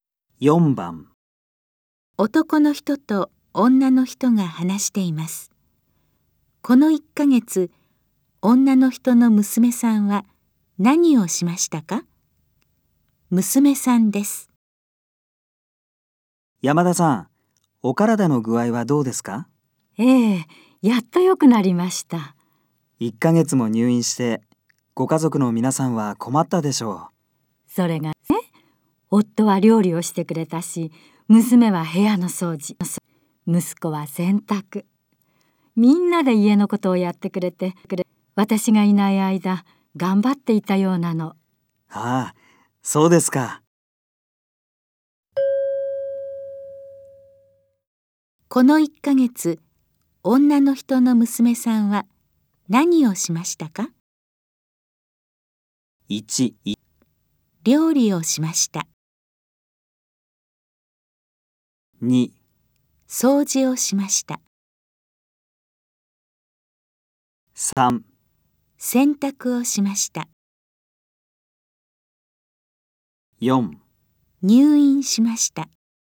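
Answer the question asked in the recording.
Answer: 2: 掃除をしました。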